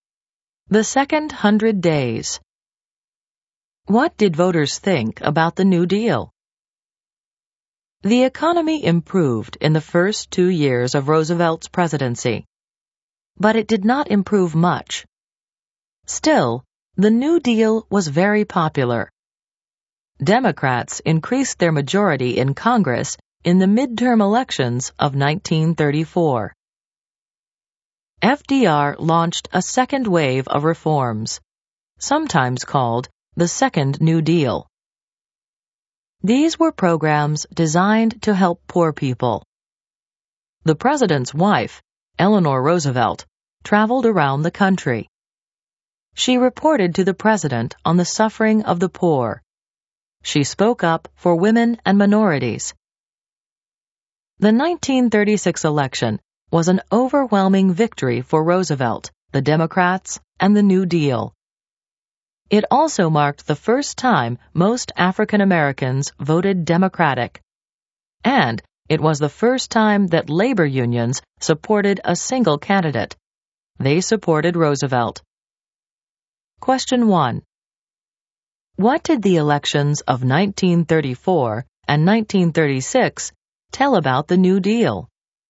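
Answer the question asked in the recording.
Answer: The New Deal was very popular; voters backed Roosevelt and the Democrats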